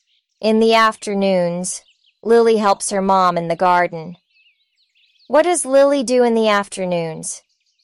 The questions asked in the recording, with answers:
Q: What does Lily do in the afternoons?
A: She helps her mom.